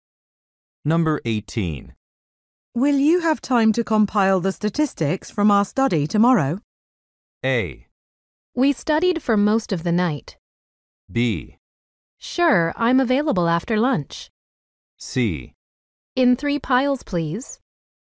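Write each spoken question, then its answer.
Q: Will you have time to compile the statistics from our study tomorrow?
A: B: Sure, I'm available after lunch.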